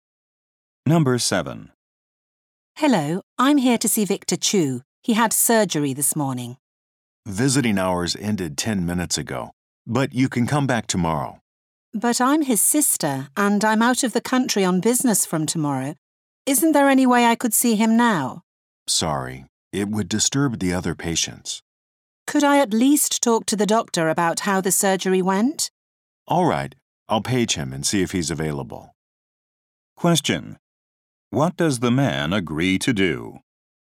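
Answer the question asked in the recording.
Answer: Page the doctor to see if he can talk to her.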